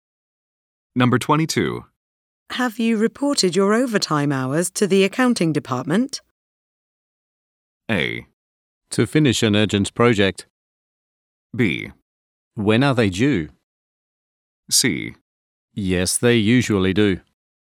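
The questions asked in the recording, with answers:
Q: Have you reported your overtime hours to the accounting department?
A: B: When are they due?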